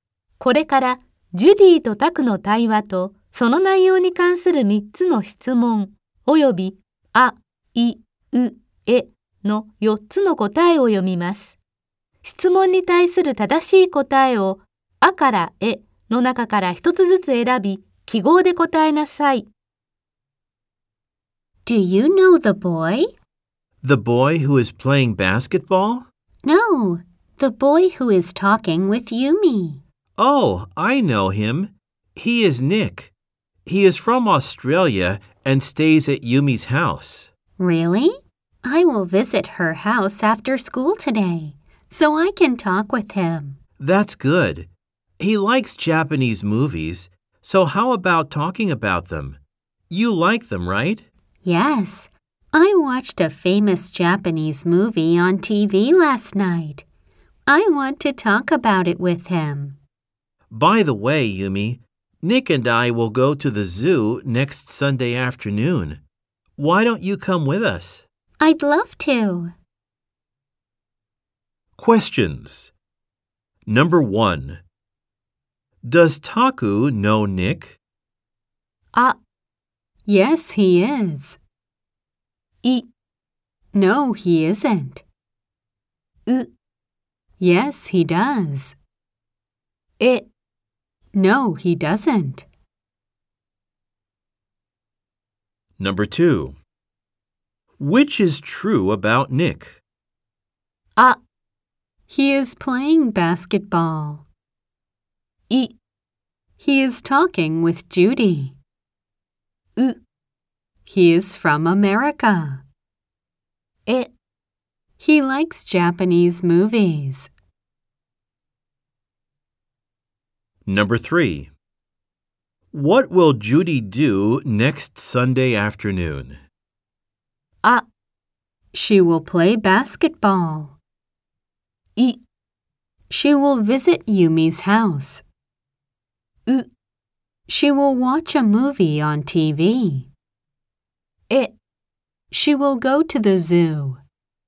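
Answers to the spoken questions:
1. う: Yes, he does.
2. え: He likes Japanese movies.
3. え: She will go to the zoo.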